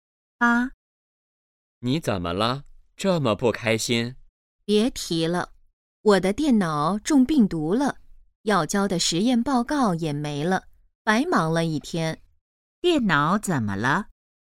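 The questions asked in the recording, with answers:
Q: 电脑怎么了?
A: 中病毒了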